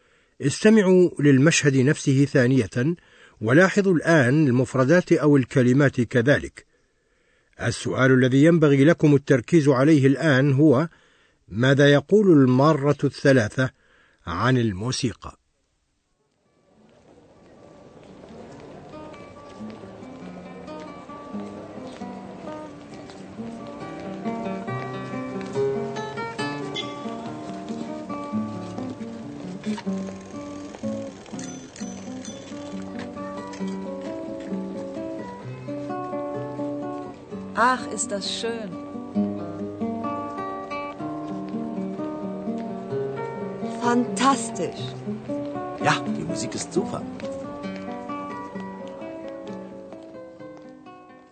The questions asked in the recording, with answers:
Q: ماذا يقول المارة الثلاثة عن الموسيقى؟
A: الثلاثة معجبون بالموسيقى.